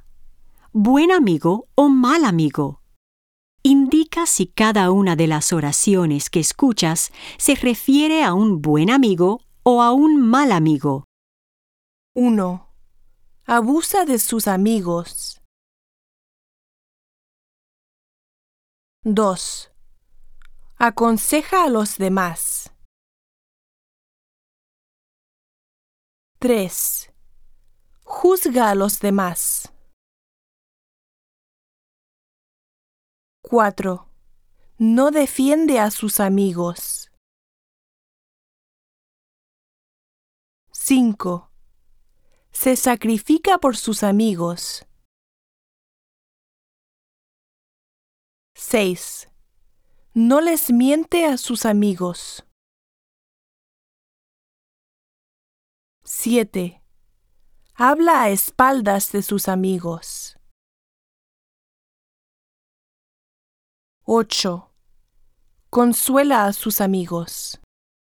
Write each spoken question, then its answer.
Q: Abusa de sus amigos.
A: 1. Mal amigo.

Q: Aconseja a los demás.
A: 2. Buen amigo.

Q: Juzga a los demás.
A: 3. Mal amigo.

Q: No defiende a sus amigos.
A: 4. Mal amigo.

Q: Se sacrifica por sus amigos.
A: 5. Buen amigo.

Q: No les miente a sus amigos.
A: 6. Buen amigo.

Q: Habla a espaldas de sus amigos.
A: 7. Mal amigo.

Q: Consuela a sus amigos.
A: 8. Buen amigo.